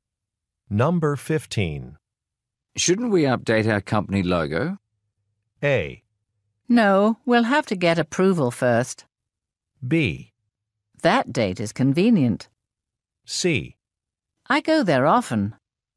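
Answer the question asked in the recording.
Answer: A: No, we'll have to get approval first.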